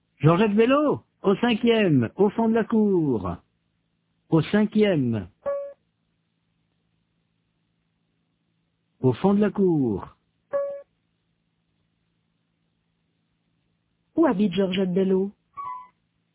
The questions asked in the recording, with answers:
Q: Où habite Georgette Bello ?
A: Au cinquième, au fond de la cour.